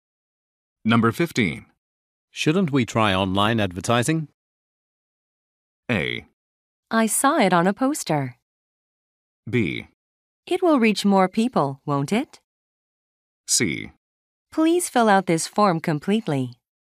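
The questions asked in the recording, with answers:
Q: Shouldn't we try online advertising?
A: B: It will reach more people, won't it?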